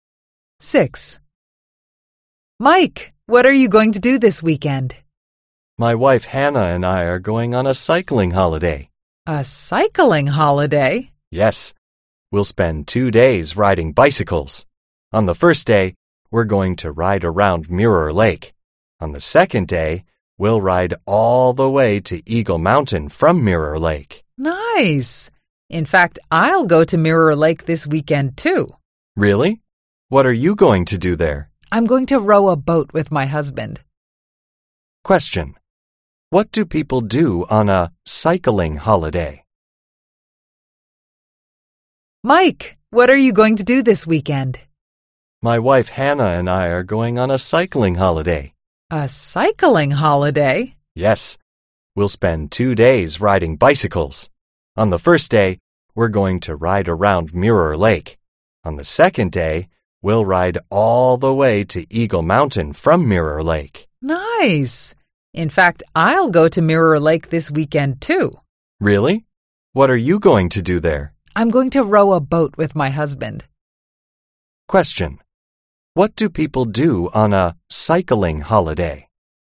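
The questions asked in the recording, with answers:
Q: What do people do on a cycling holiday?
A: They ride bicycles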